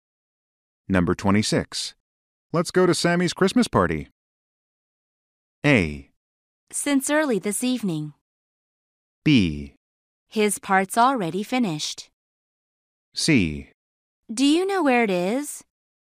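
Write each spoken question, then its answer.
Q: Let's go to Sammy's Christmas party.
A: C: Do you know where it is?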